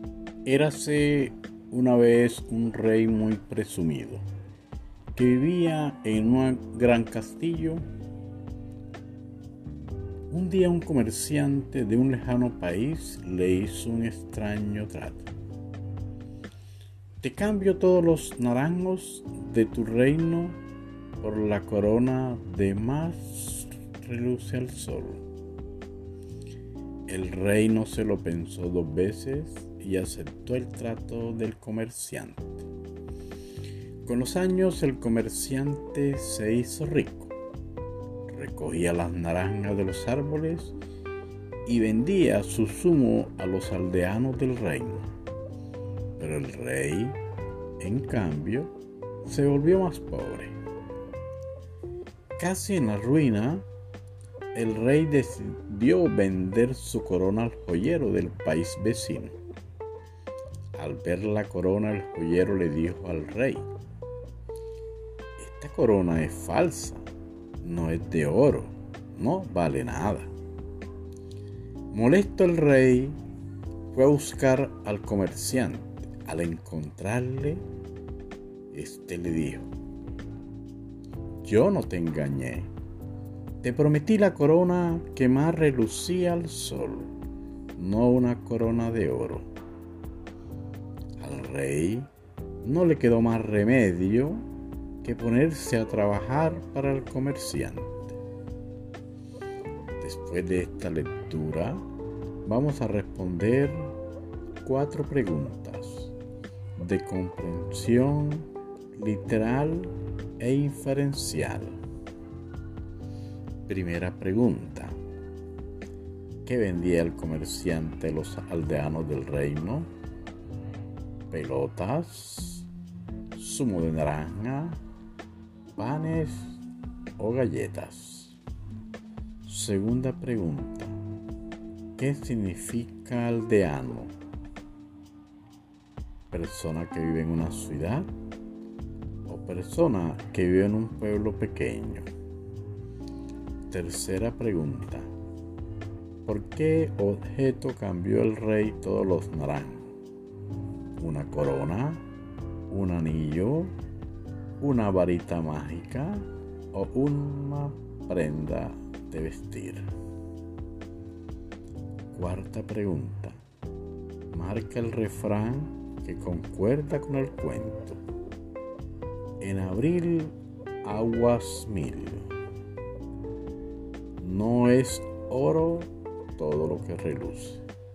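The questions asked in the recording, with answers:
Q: ¿Qué vendía el comerciante a los aldeanos del reino?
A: zumo de naranja

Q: ¿Por qué objeto cambió el rey todos los naranjos?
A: Una corona

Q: Marca el refrán que concuerda con el cuento.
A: No es oro todo lo que reluce.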